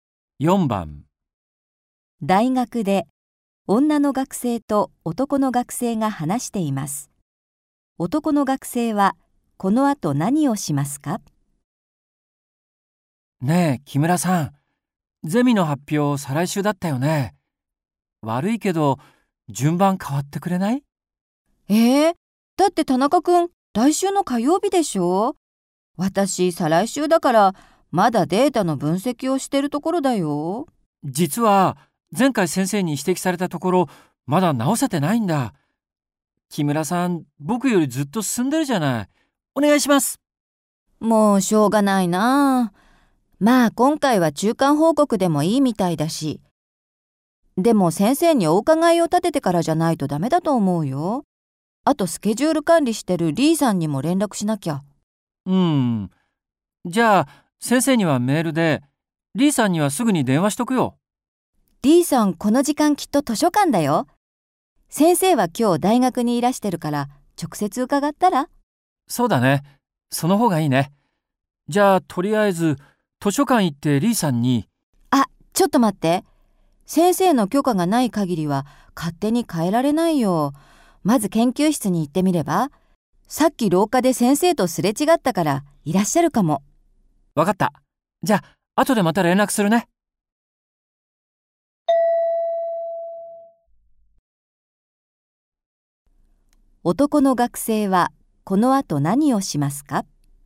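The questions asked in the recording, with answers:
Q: 男の学生はこの後何をしますか?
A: 研究室に行って先生に順番を変えていいか許可をもらう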